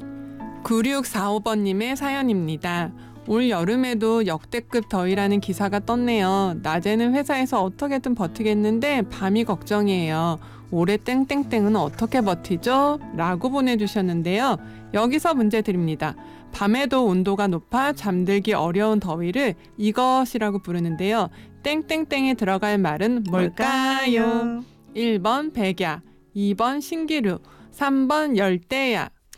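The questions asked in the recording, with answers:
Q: 땡땡땡에 들어갈 말은 뭘까요? 1번 백야, 2번 신기루, 3번 열대야.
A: 3: 열대야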